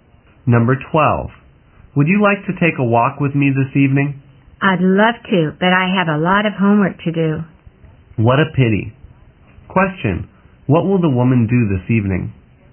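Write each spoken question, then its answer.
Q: What will the woman do this evening?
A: Do her homework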